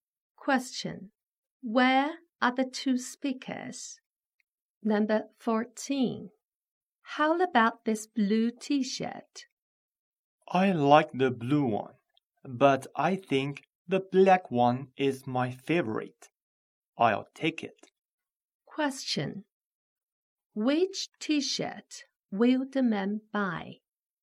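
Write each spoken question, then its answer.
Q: Which T-shirt will the man buy?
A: The black one.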